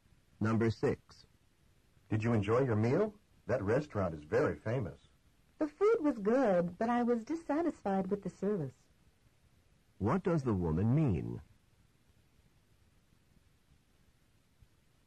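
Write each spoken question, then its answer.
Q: What does the woman mean?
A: The food was good but she didn't like the service.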